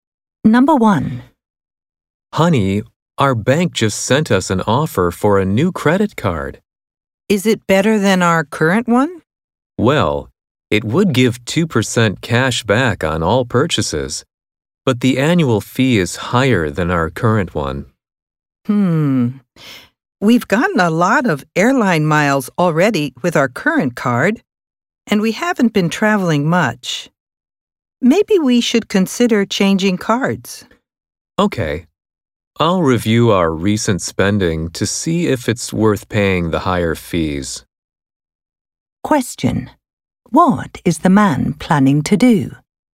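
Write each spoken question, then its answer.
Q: What is the man planning to do?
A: Review their recent spending to see if the new card's higher fee is worth it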